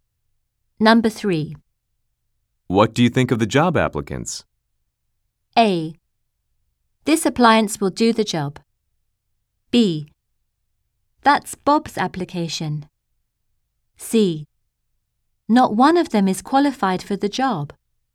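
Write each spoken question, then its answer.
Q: What do you think of the job applicants?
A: C: Not one of them is qualified for the job.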